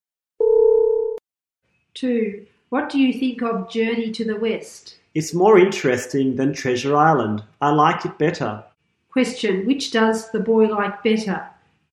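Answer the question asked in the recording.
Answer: Journey to the West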